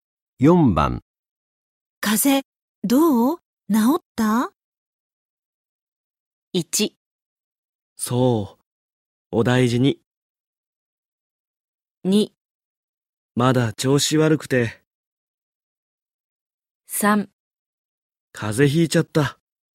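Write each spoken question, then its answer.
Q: 風邪、どう治った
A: 2: まだ調子悪くて。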